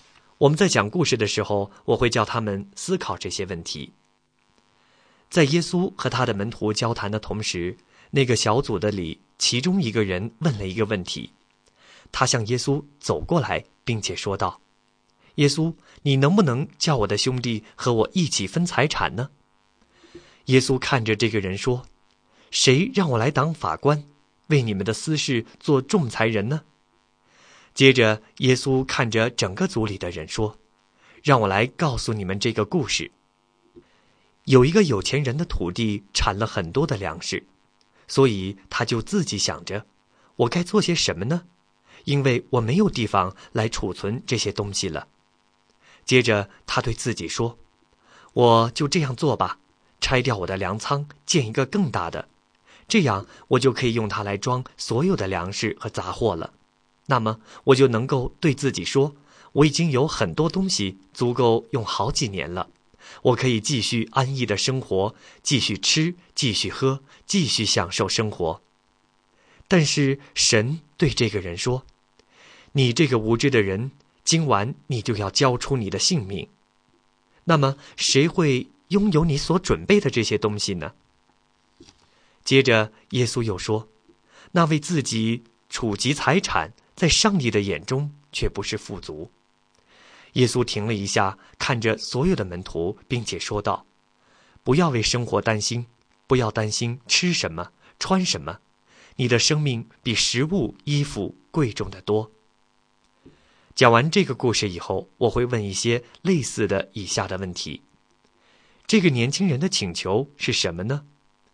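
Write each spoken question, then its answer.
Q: 这个年轻人的请求是什么呢?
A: 请耶稣叫他的兄弟和他一起分财产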